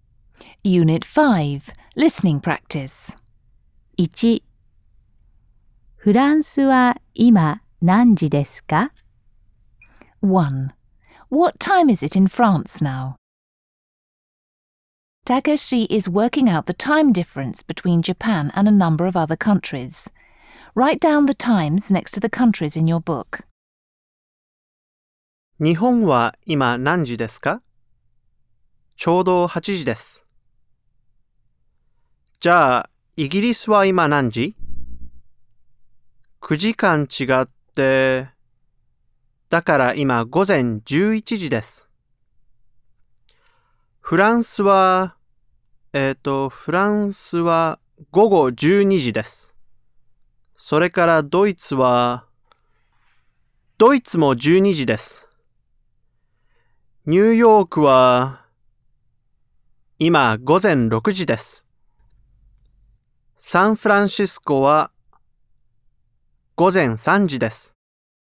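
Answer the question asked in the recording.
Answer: 午後12時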